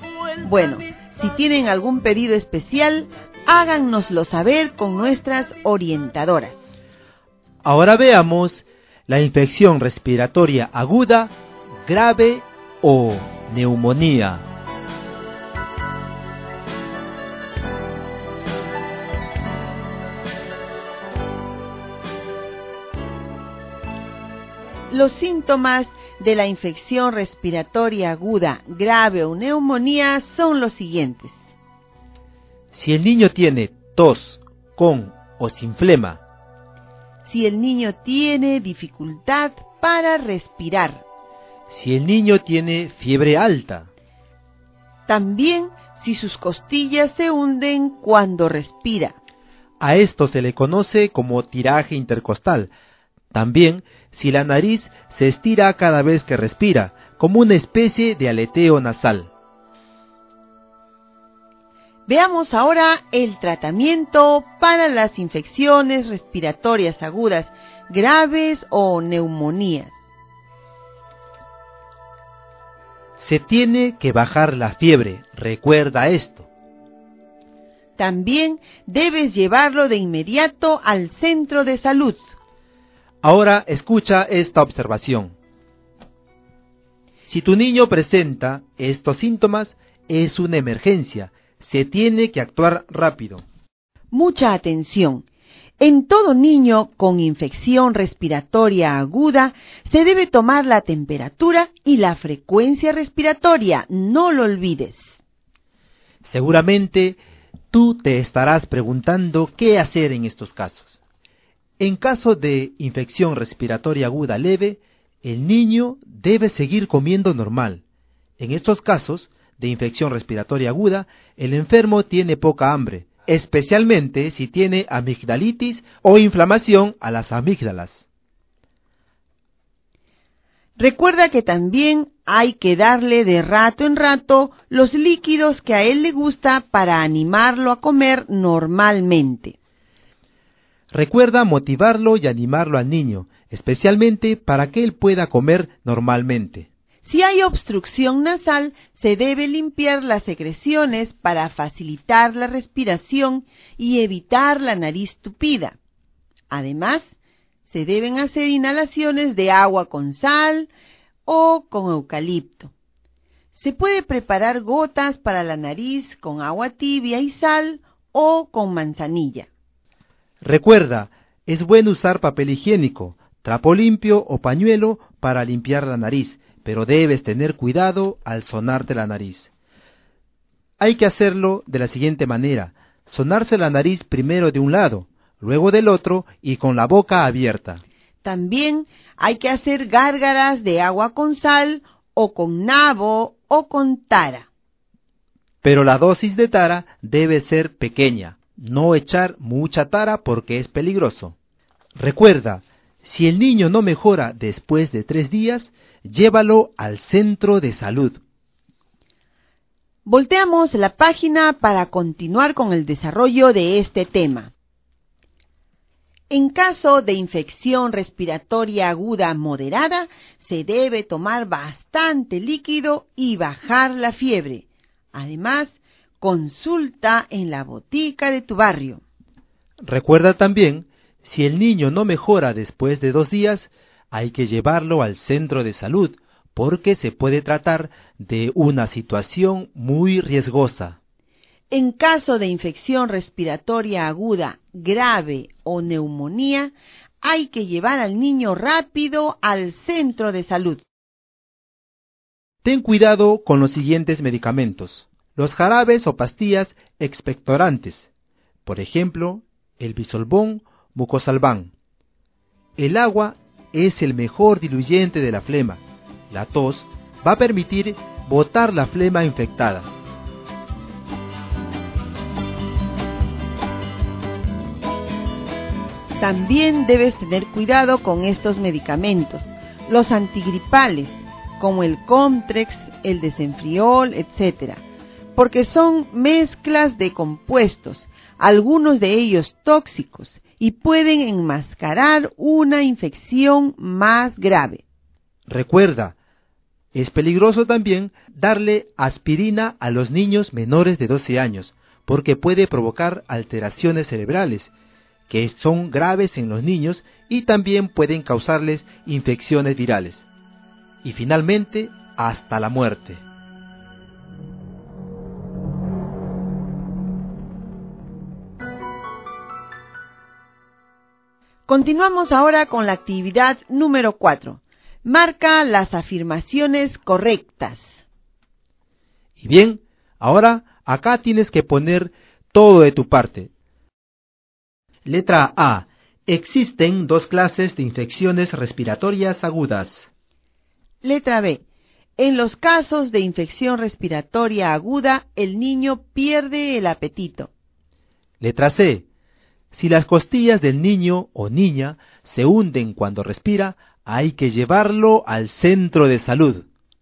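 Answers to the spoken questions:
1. Incorrecta (son 3: leve, moderada y grave)
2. Correcta
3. Correcta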